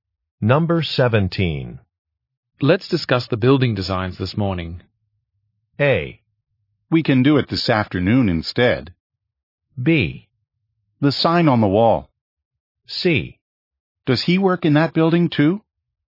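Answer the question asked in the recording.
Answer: A: We can do it this afternoon instead.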